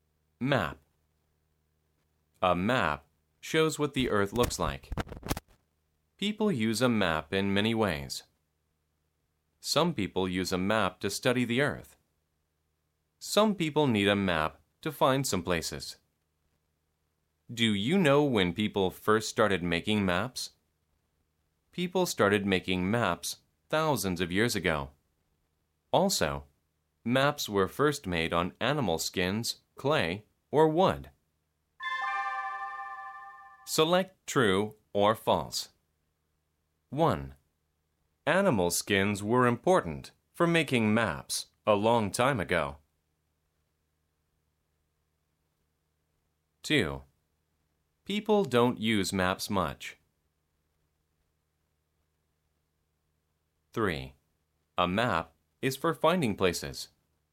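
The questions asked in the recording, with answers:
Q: Animal skins were important for making maps a long time ago.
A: True

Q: People don't use maps much.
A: False

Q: A map is for finding places.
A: True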